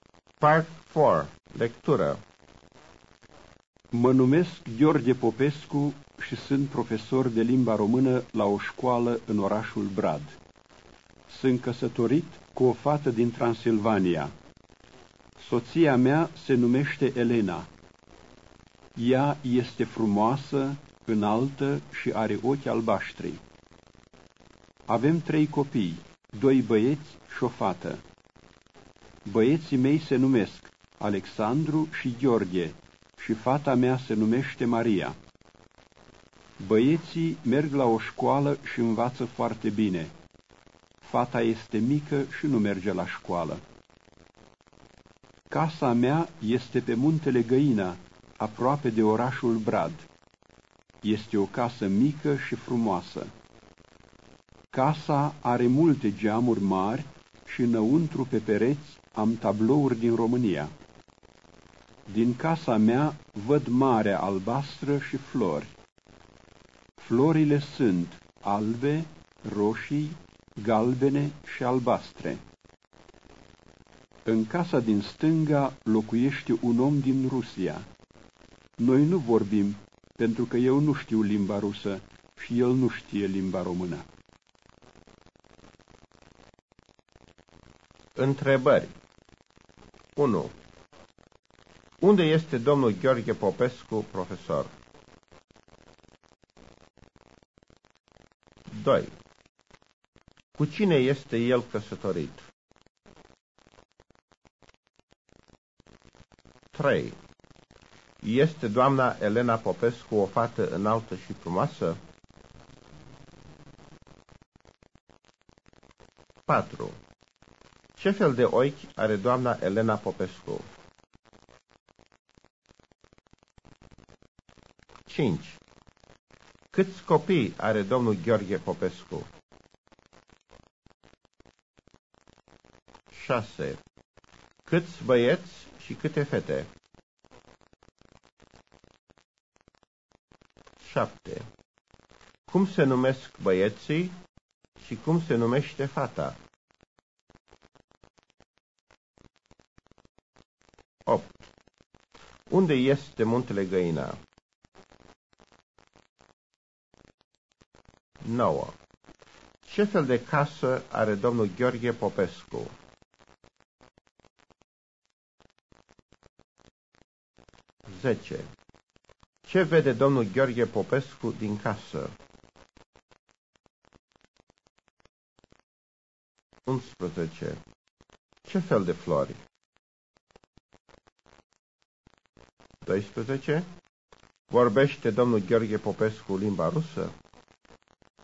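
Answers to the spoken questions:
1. La o școală în orașul Brad
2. Cu o fată din Transilvania, Elena
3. Da
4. Ochi albaștri
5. 3 copii
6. 2 băieți și o fată
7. Alexandru și Gheorghe; fata se numește Maria
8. Aproape de orașul Brad
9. O casă mică și frumoasă
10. Marea albastră și flori
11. Albe, roșii, galbene și albastre
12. Nu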